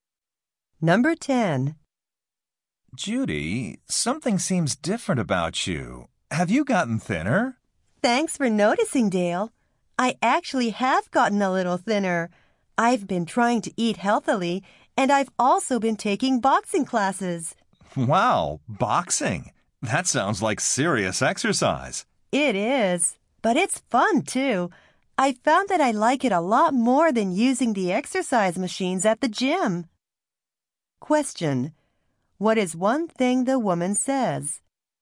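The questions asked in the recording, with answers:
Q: What is one thing the woman says?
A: She has been taking boxing classes and has gotten thinner.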